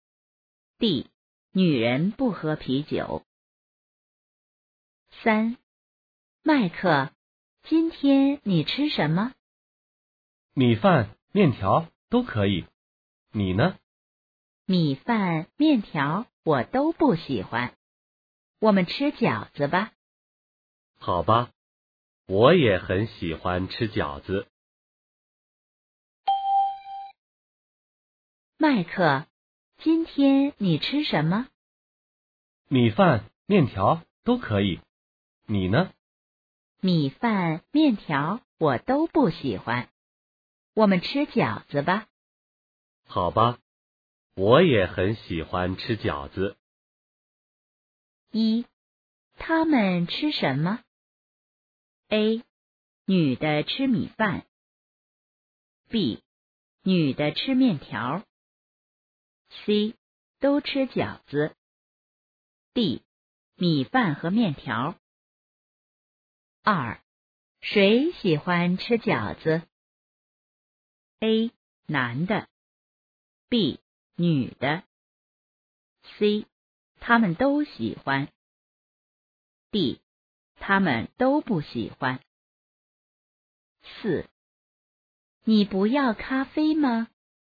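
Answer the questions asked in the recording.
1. C: 都吃饺子。
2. C: 他们都喜欢。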